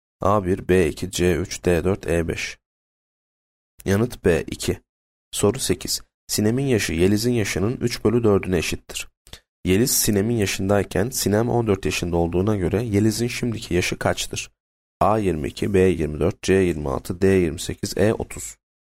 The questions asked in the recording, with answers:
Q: Yeliz Sinem'in yaşındayken Sinem 14 yaşında olduğuna göre Yeliz'in şimdiki yaşı kaçtır?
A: Yanıt D 28.